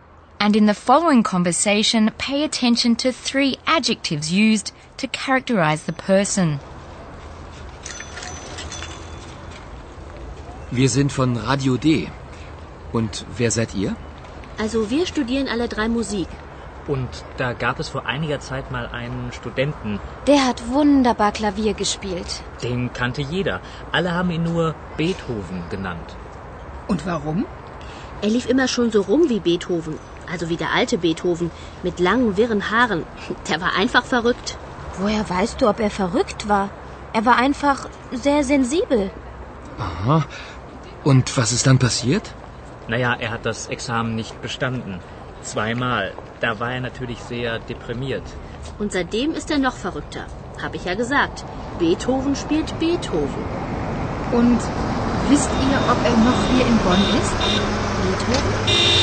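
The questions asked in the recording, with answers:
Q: And in the following conversation, pay attention to three adjectives used to characterize the person.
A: verrückt (mad), sensibel (sensitive), deprimiert (depressed)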